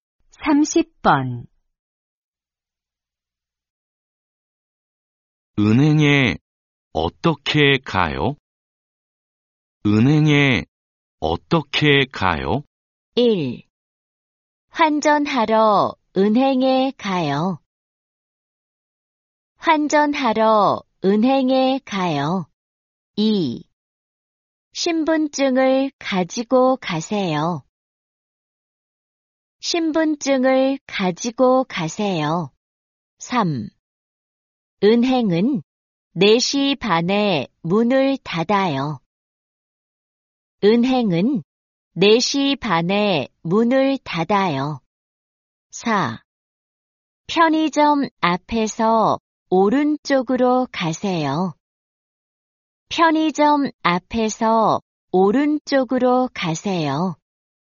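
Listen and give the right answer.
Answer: 4: 편의점 앞에서 오른쪽으로 가세요.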